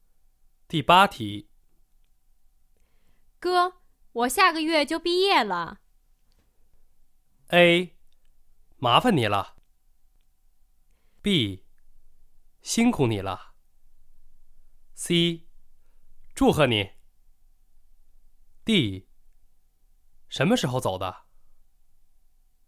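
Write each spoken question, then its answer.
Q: 哥,我下个月就毕业了。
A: C: 祝贺你。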